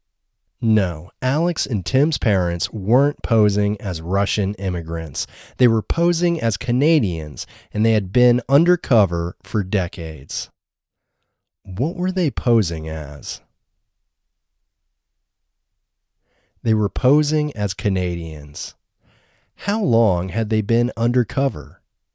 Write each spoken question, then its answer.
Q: What were they posing as?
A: They were posing as Canadians.

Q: How long had they been undercover?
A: They had been undercover for decades.